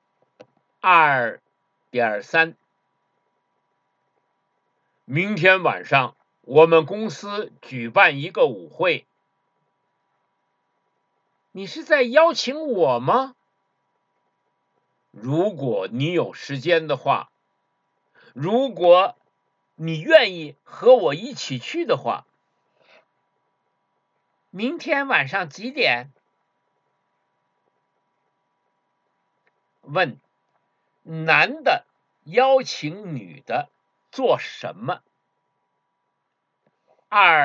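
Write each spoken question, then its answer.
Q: 问,男的邀请女的做什么?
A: 参加公司举办的舞会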